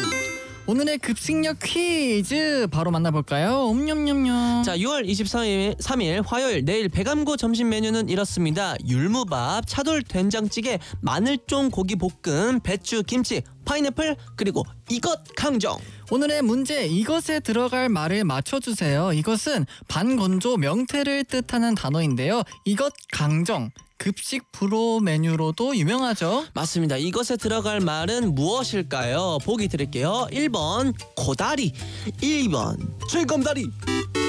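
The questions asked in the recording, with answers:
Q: 이것에 들어갈 말은 무엇일까요?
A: 1: 코다리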